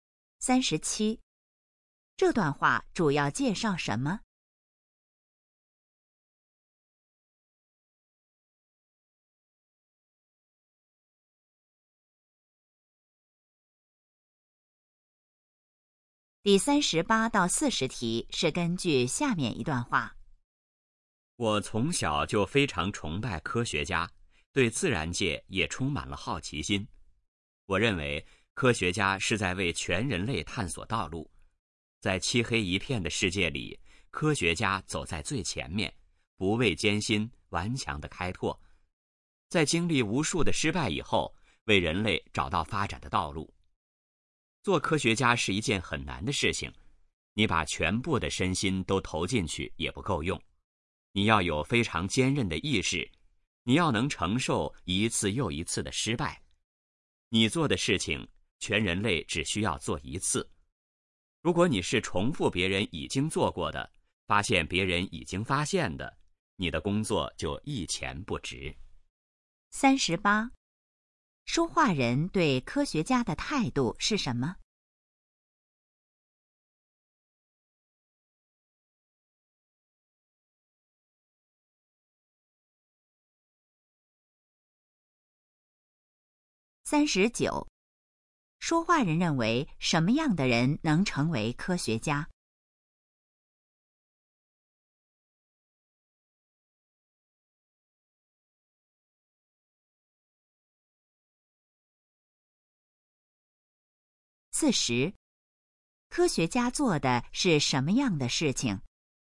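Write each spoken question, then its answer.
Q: 说话人对科学家的态度是什么?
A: 崇拜

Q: 说话人认为什么样的人能成为科学家?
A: 意志坚韧、能承受一次次失败的人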